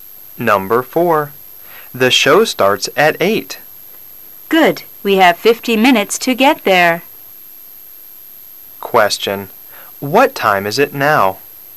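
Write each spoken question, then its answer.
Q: What time is it now?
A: 7:10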